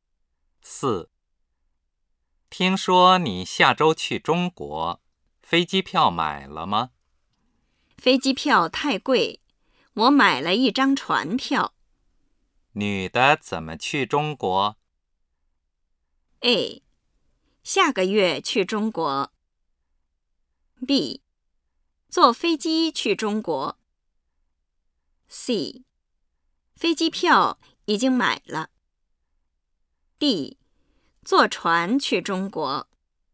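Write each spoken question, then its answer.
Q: 女的怎么去中国?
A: D: 坐船去中国。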